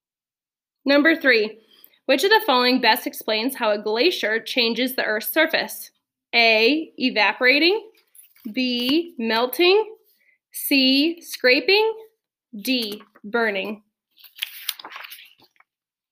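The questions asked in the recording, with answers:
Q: Which of the following best explains how a glacier changes the Earth's surface?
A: C: scraping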